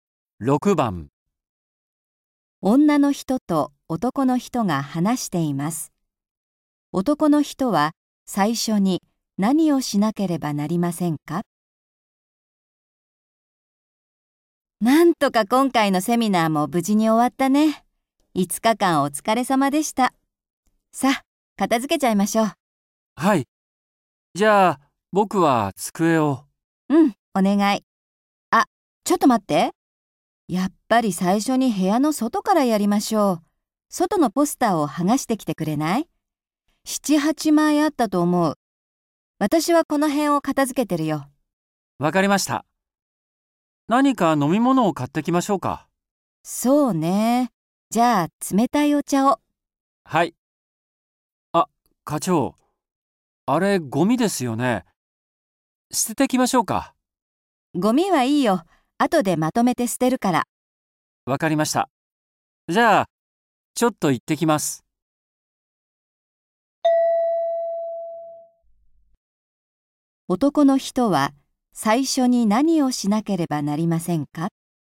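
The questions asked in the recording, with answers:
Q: 男の人は最初に何をしなければなりませんか?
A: 部屋の外のポスターを剥がす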